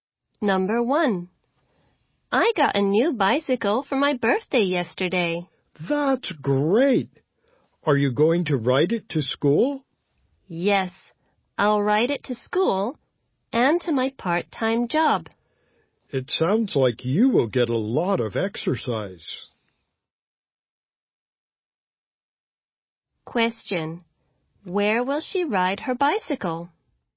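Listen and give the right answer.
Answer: To school and to her part-time job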